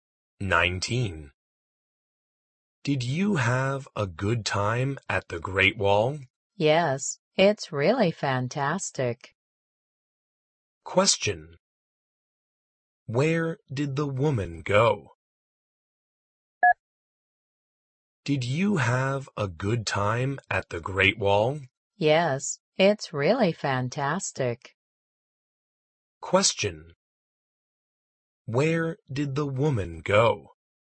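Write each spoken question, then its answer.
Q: Where did the woman go?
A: The Great Wall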